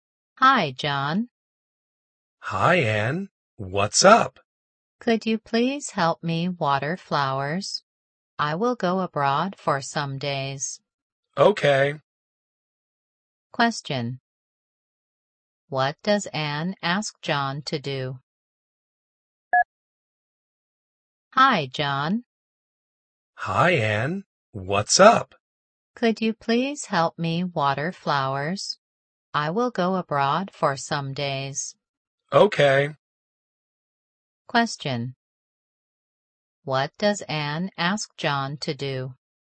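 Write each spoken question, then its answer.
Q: What does Anne ask John to do?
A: Water her flowers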